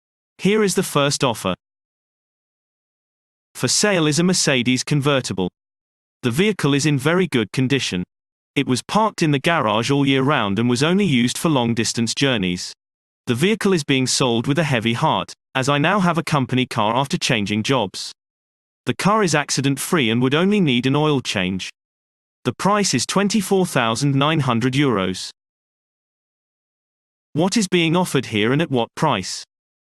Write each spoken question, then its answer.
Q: What is being offered here and at what price?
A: Answer. A car is being sold at a price of €24,900.